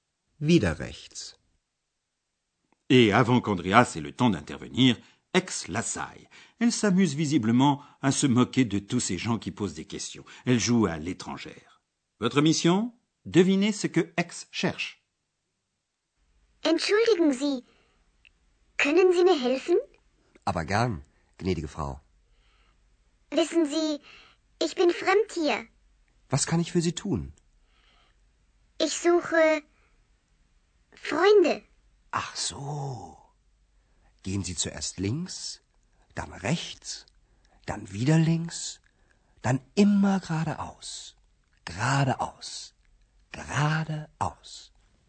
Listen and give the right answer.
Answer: Ex dit qu'elle cherche des amis.